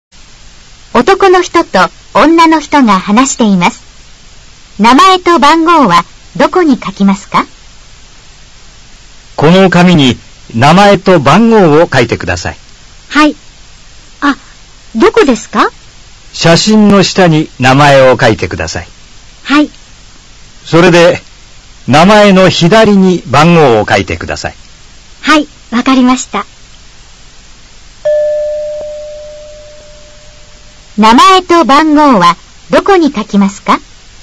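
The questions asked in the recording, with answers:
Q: 名前と番号はどこに書きますか?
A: 名前は写真の下、番号は名前の左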